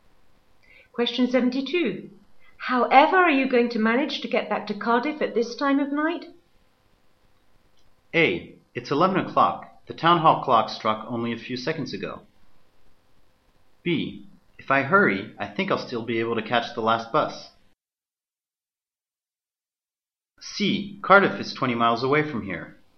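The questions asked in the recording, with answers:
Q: However are you going to manage to get back to Cardiff at this time of night?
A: B: If I hurry, I think I'll still be able to catch the last bus.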